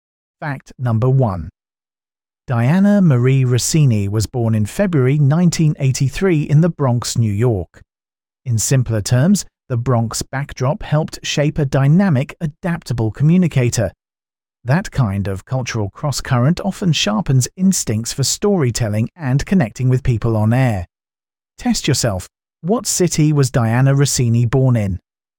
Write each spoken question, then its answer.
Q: What city was Diana Rossini born in?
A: Correct answer, the Bronx.